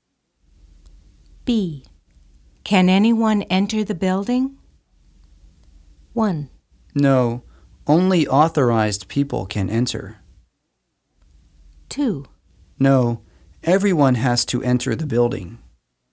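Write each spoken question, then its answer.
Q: Can anyone enter the building?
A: 1: No, only authorized people can enter.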